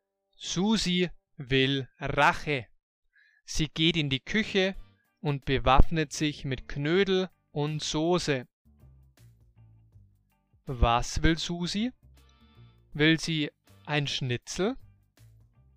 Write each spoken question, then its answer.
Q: Was will Susi? Will sie ein Schnitzel?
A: Nein, sie will kein Schnitzel.